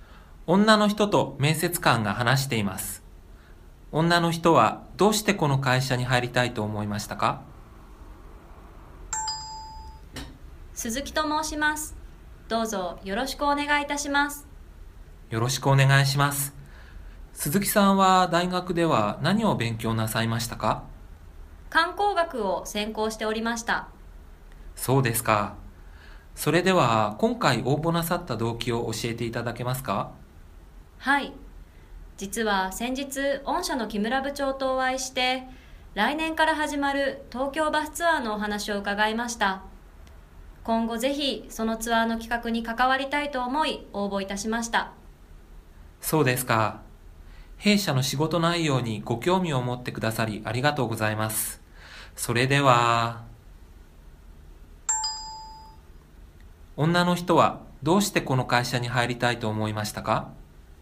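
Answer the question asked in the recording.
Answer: 来年から始まる東京バスツアーの企画に関わりたいから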